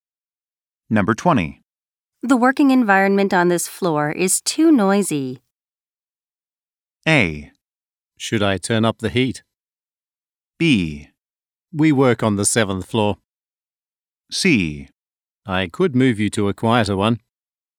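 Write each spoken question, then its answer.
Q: The working environment on this floor is too noisy.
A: C: I could move you to a quieter one.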